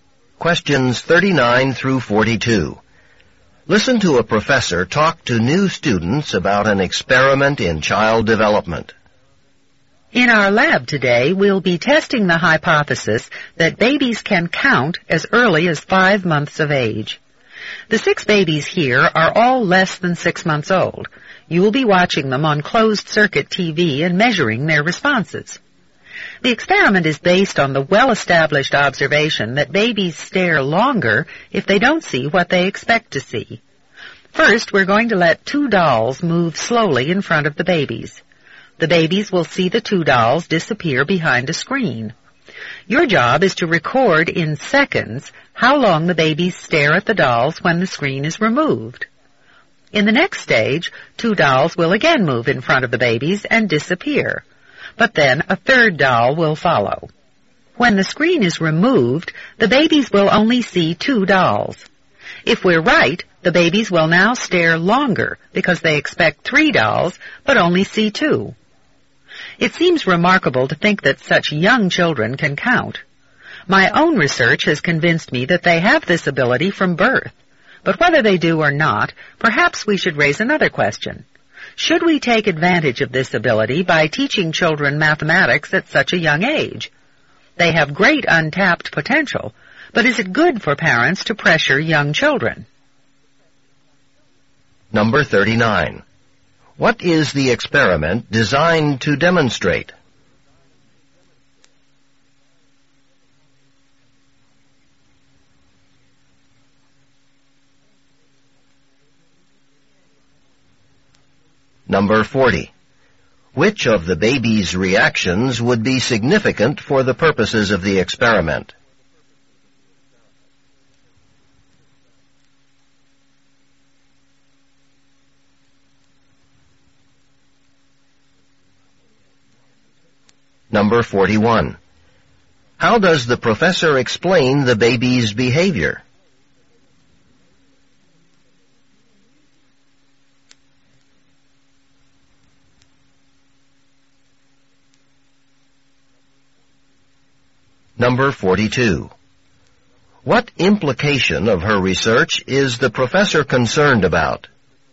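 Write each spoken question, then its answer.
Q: What is the experiment designed to demonstrate?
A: That babies can count as early as 5 months of age

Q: Which of the baby's reactions would be significant for the purposes of the experiment?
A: Staring longer when they see two dolls instead of the expected three

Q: How does the professor explain the baby's behavior?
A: Babies stare longer when they don't see what they expect to see

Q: What implication of her research is the professor concerned about?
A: That parents may pressure very young children by teaching them mathematics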